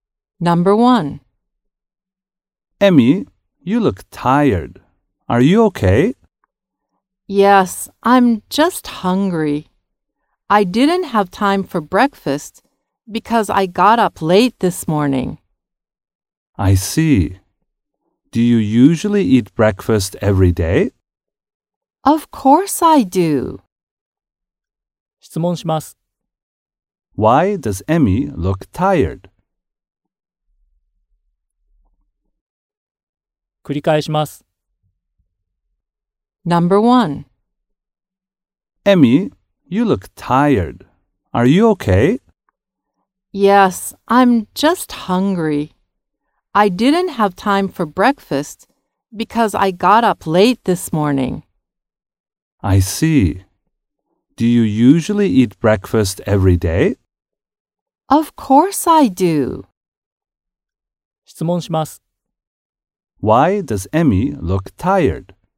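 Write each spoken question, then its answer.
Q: Why does Emmy look tired?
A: She is hungry because she didn't have breakfast (she got up late).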